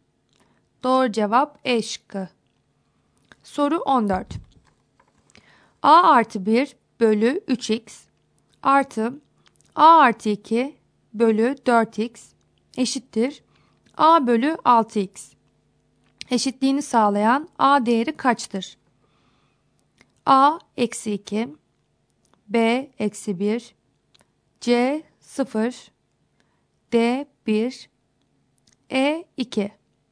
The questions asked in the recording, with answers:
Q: Eşitliğini sağlayan A değeri kaçtır?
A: Doğru cevap A şıkkı.